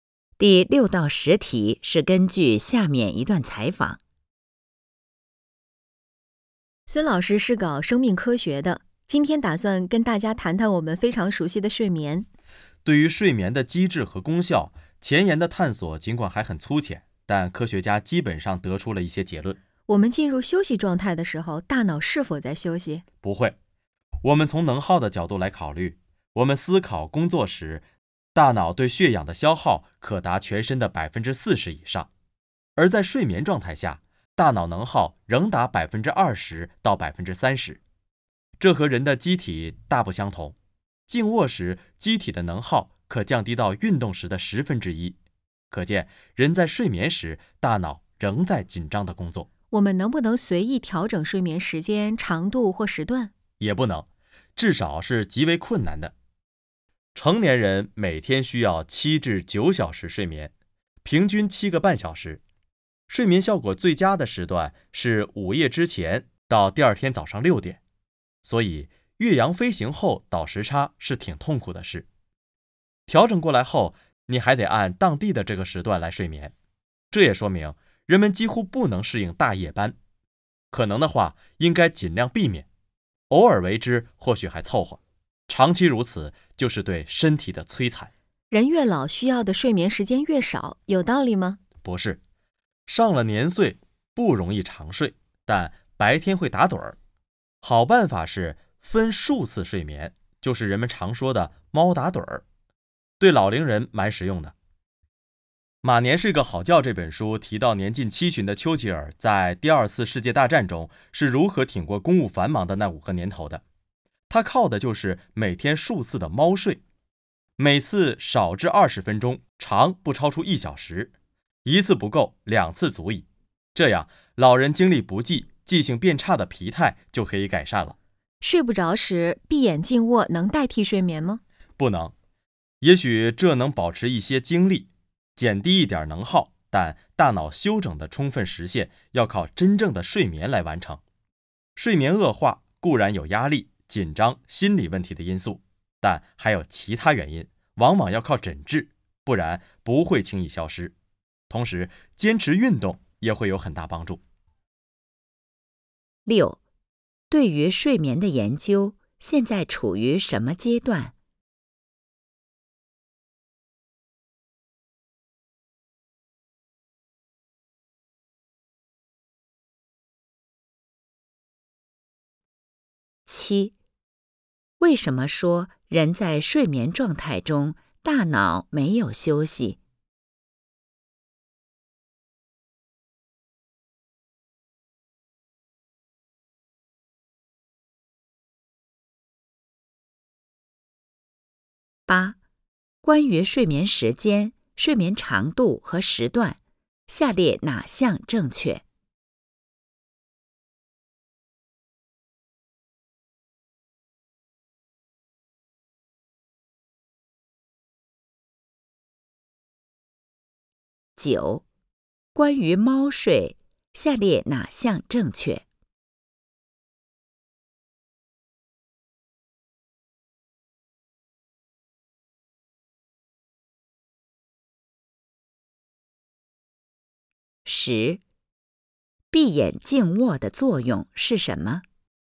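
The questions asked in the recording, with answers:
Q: 对于睡眠的研究现在处于什么阶段?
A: 前沿探索还很粗浅,但已得出一些基本结论

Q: 为什么说人在睡眠状态中大脑没有休息?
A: 睡眠时大脑能耗仍达全身的20%到30%

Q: 闭眼静卧的作用是什么?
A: 能保持一些精力,减低一点能耗,但不能代替睡眠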